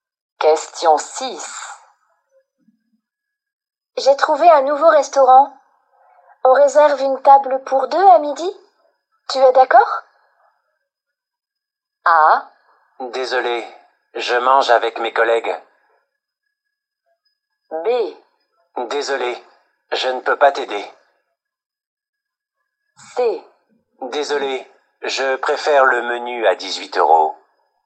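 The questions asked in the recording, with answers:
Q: Tu es d'accord?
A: A: Désolé, je mange avec mes collègues.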